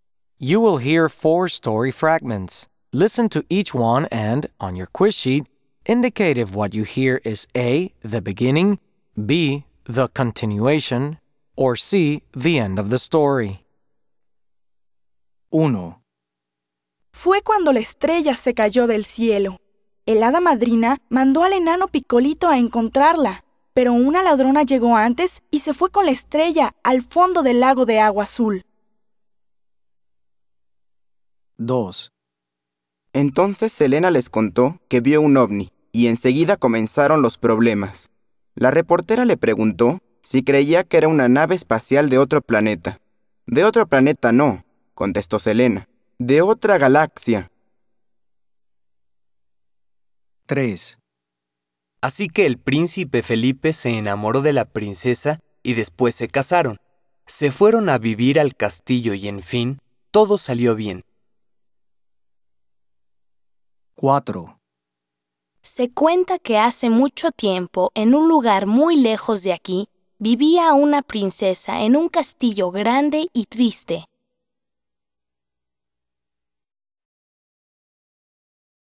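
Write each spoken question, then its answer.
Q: indicate if what you hear is A, the beginning, B, the continuation, or C, the end of the story.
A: C: the end

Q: indicate if what you hear is A, the beginning, B, the continuation, or C, the end of the story.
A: A: the beginning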